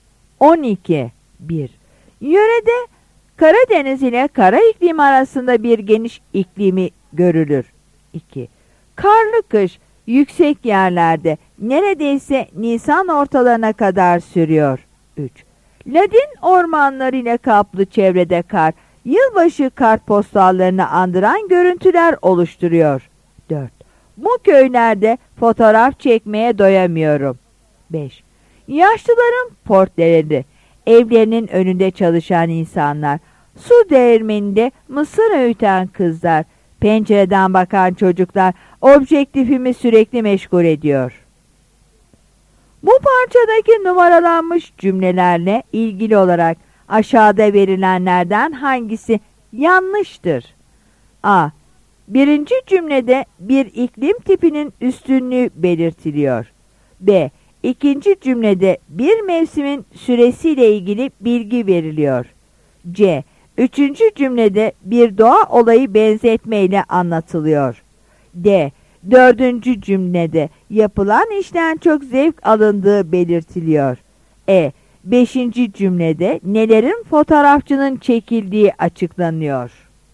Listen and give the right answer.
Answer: Yanıt A'dır.